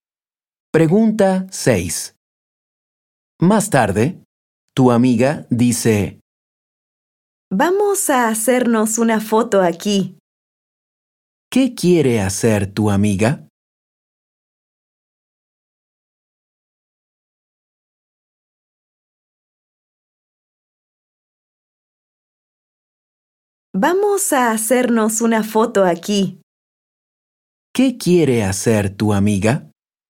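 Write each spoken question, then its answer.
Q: ¿Qué quiere hacer tu amiga?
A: hacerse una foto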